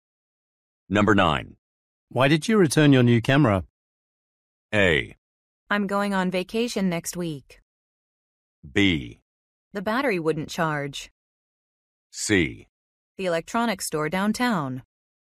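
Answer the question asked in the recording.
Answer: B: The battery wouldn't charge.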